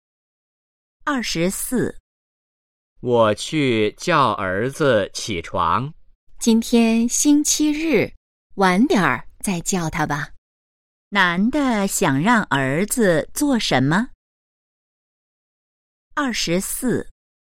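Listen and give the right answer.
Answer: 起床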